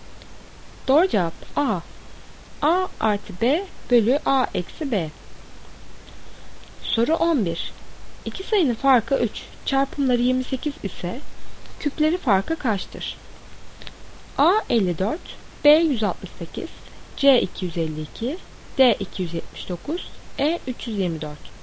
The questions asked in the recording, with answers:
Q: İki sayının farkı 3, çarpımları 28 ise küpleri farkı kaçtır?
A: Doğru cevap D 279.